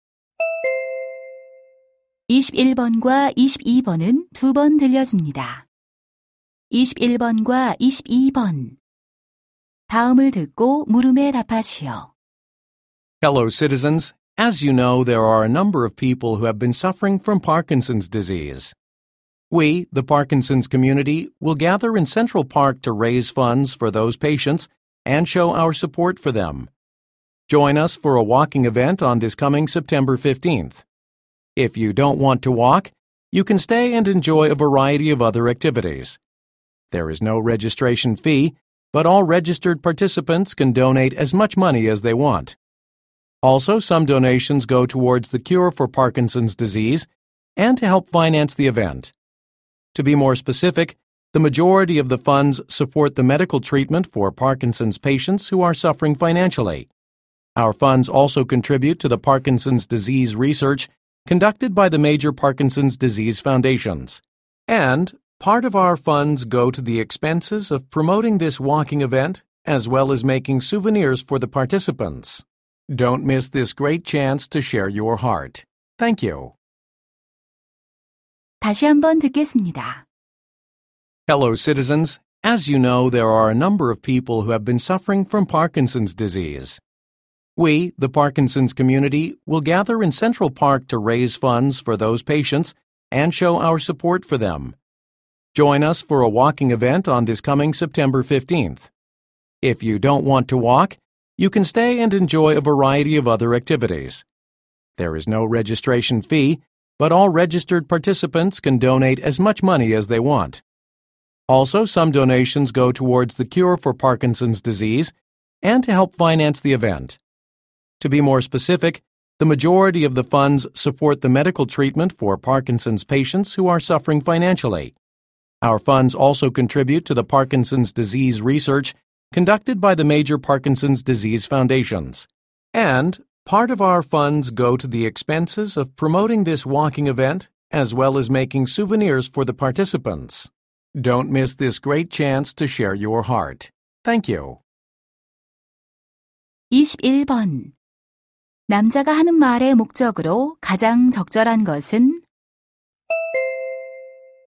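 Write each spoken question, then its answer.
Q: 남자가 하는 말의 목적으로 가장 적절한 것은?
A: 파킨슨병 환자를 위한 모금 걷기 행사 참여를 권유하려고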